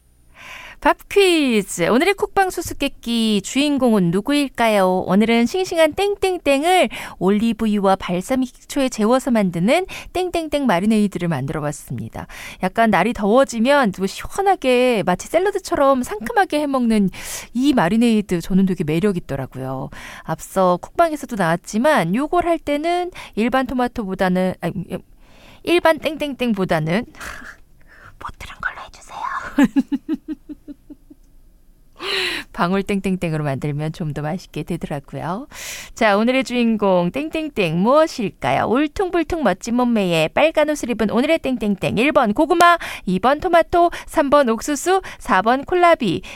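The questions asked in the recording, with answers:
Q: 자, 오늘의 주인공 땡땡땡 무엇일까요?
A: 2번: 토마토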